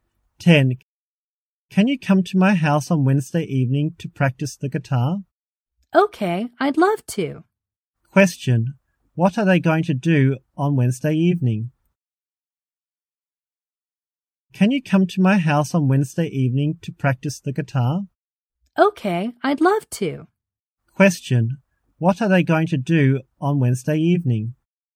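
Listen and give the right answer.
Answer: Practice the guitar at the speaker's house.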